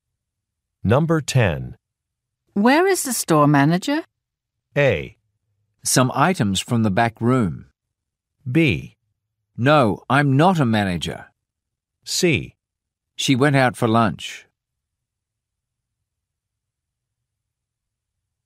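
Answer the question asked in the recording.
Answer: C: She went out for lunch.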